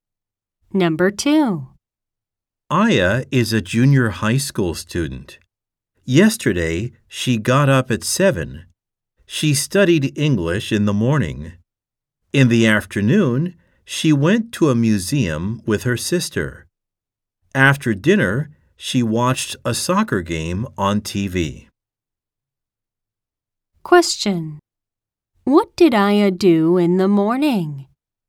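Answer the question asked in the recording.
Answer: She studied English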